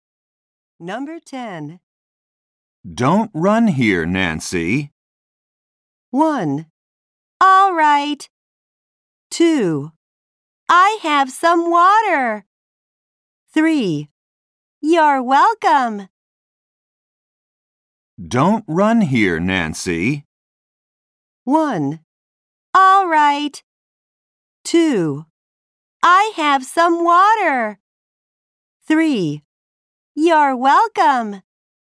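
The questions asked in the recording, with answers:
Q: Don't run here, Nancy.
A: 1: All right.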